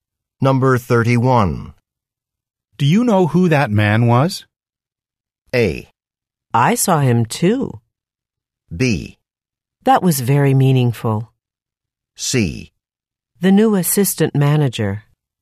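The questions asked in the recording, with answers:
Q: Do you know who that man was?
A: C: The new assistant manager.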